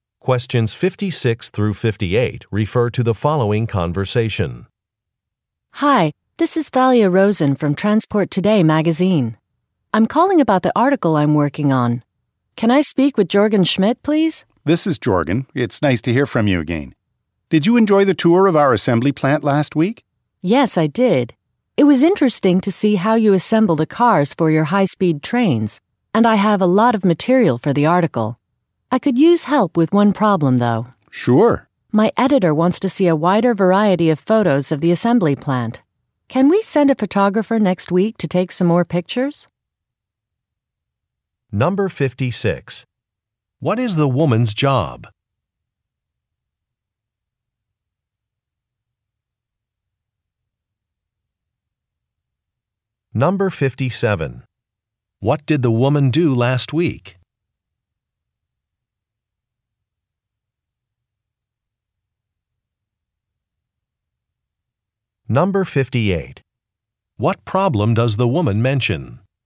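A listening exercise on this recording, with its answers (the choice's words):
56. What is the woman's job?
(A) Travel agent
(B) Pilot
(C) Journalist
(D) Lawyer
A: Journalist

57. What did the woman do last week?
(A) She toured a facility.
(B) She received a business loan.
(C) She attended a trade show.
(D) She conducted job interviews.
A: She toured a facility.

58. What problem does the woman mention?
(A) A flight was canceled.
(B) An office was closed.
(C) Some signatures are missing.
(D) More photographs are needed.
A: More photographs are needed.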